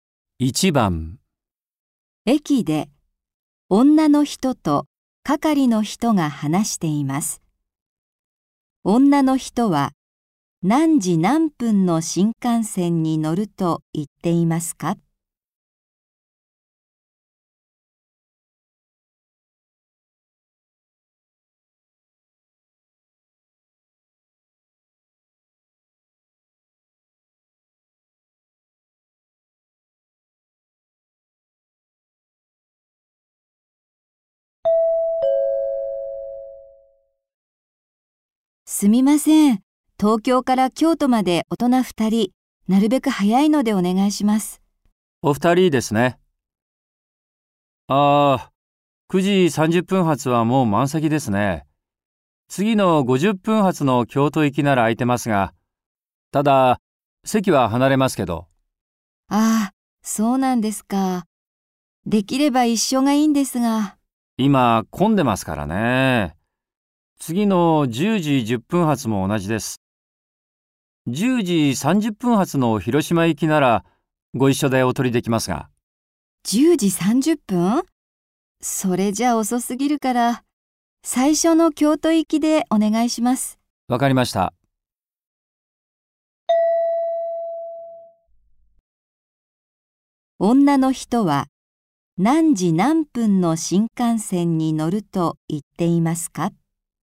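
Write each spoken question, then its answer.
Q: 女の人は何時何分の新幹線に乗ると言っていますか?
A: 9時50分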